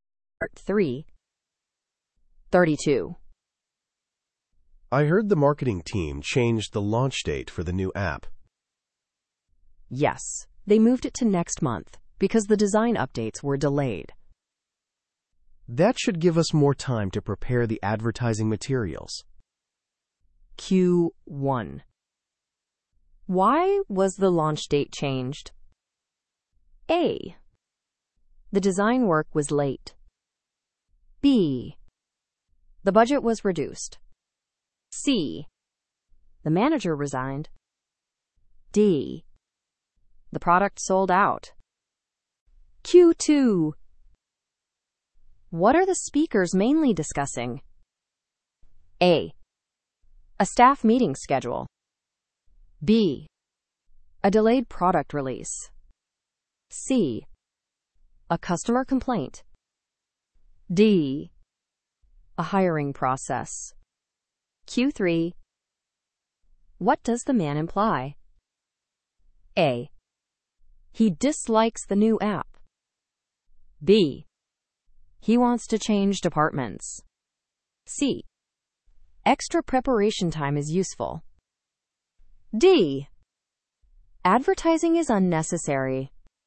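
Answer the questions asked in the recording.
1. A: The design work was late.
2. B: A delayed product release.
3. C: Extra preparation time is useful.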